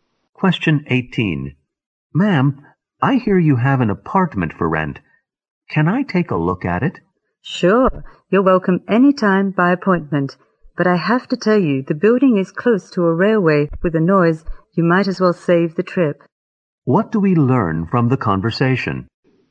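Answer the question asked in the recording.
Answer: The apartment is noisy because it is near a railway.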